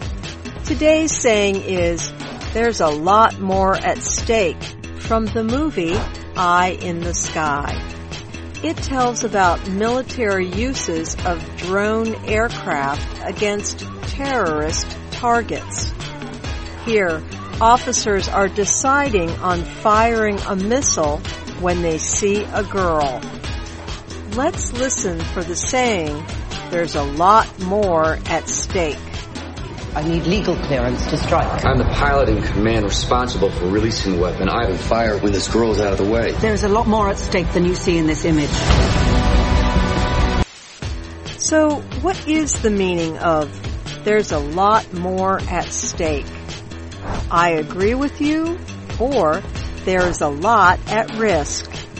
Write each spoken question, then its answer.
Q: So, what is the meaning of there's a lot more at stake?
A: There is a lot more at stake means there is a lot at risk.